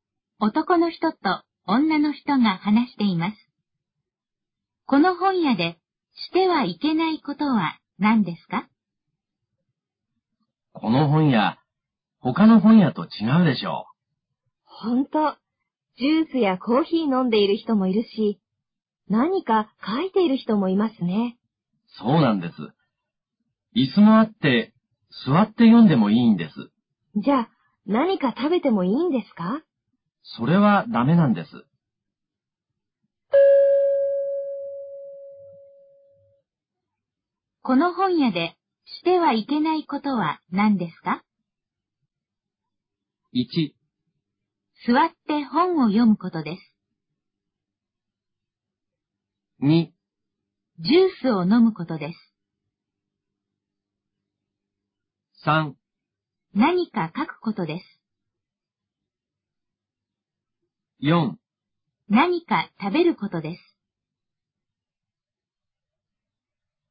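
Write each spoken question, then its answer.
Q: この本屋でしてはいけないことは何ですか?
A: 4: 何か食べることです。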